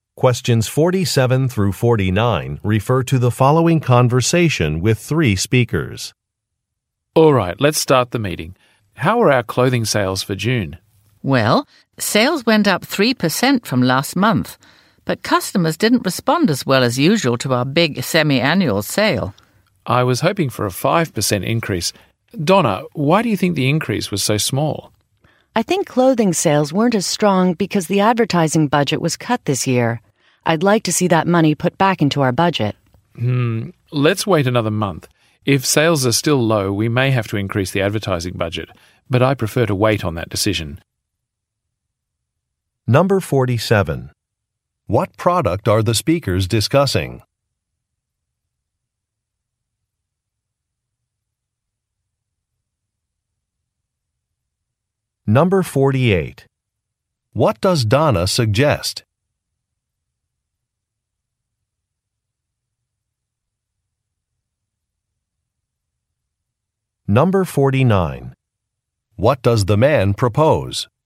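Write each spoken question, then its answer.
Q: What product are the speakers discussing?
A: Clothing

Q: What does Donna suggest?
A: Putting money back into the advertising budget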